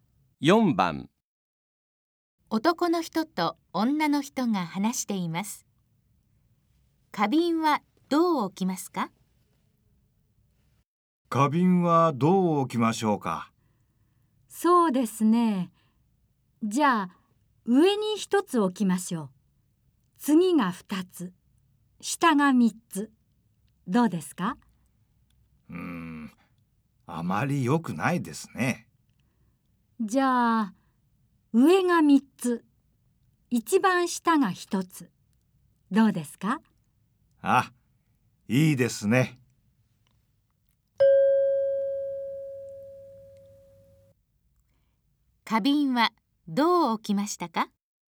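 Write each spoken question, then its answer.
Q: 花瓶はどう置きましたか?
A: 上に三つ、一番下に一つ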